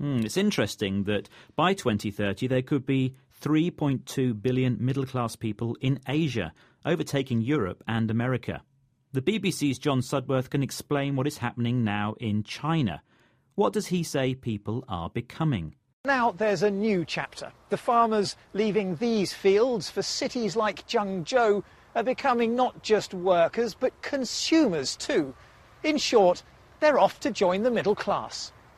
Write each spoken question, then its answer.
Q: What does he say people are becoming?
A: They are becoming consumers because their income, the money they earn, has gone up.